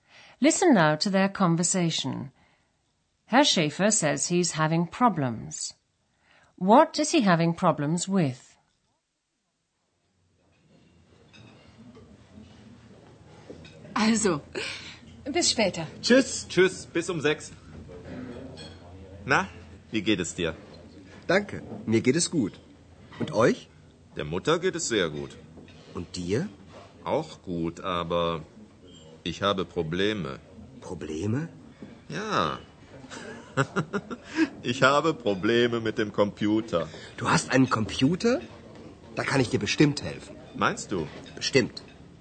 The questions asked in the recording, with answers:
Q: What is he having problems with?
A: Herr Schäfer says he's having problems with his computer.